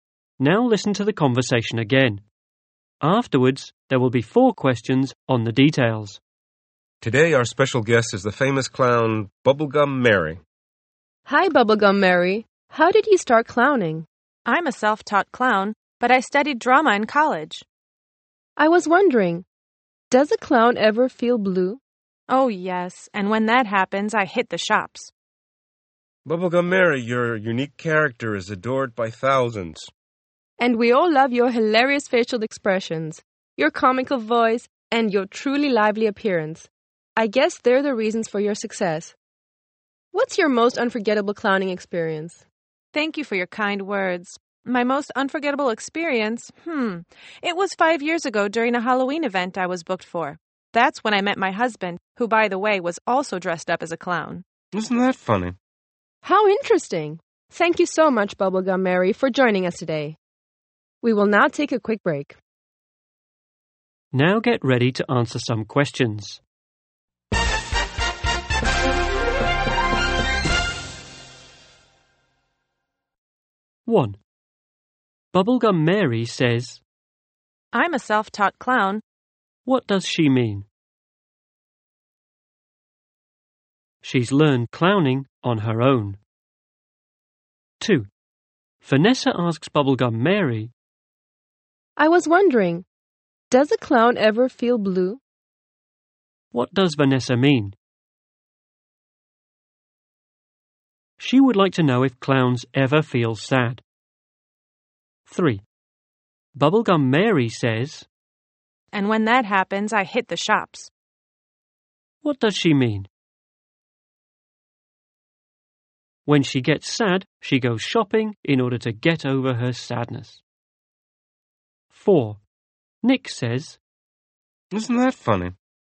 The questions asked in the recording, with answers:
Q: What does she mean?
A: She's learned clowning on her own.

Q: What does Vanessa mean?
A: She would like to know if clowns ever feel sad.